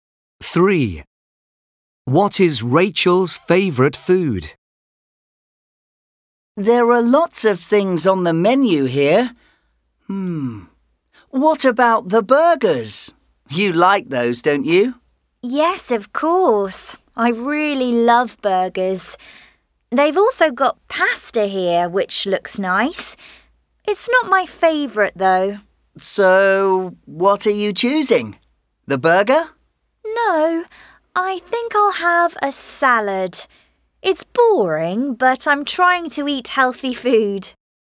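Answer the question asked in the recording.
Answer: burgers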